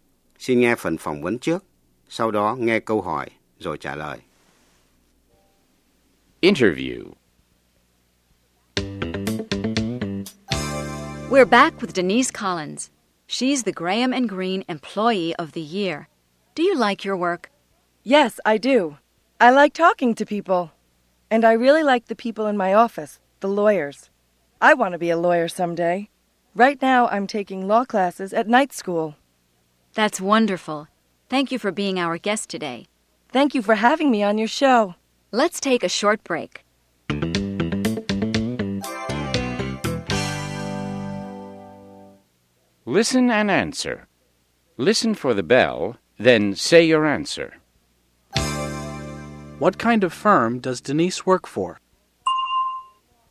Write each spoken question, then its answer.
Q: What kind of firm does Denise work for?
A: She works for a law firm.